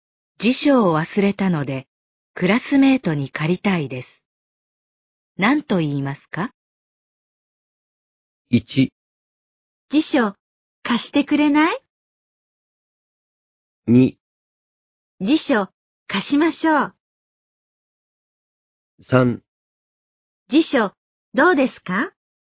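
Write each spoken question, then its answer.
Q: 辞書を忘れたので、クラスメートに借りたいです。何と言いますか?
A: 1: 辞書、貸してくれない?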